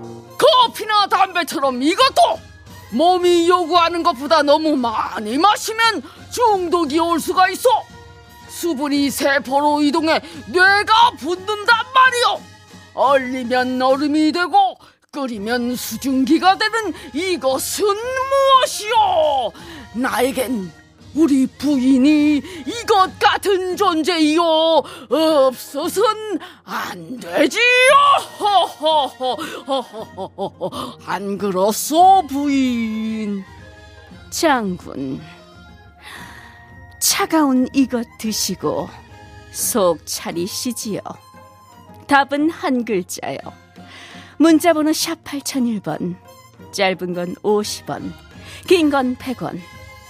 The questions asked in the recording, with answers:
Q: 얼리면 얼음이 되고 끓이면 수증기가 되는 이것은 무엇이오?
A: 정답은 물입니다.